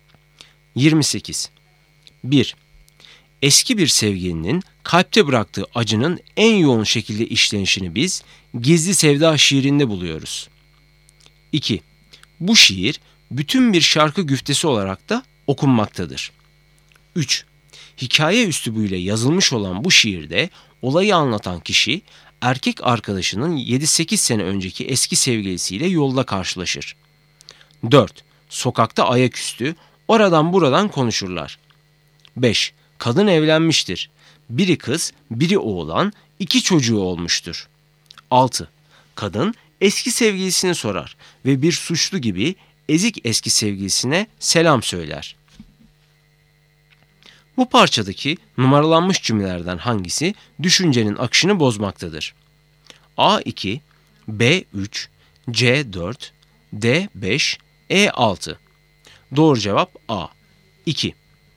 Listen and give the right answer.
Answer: Doğru cevap A 2.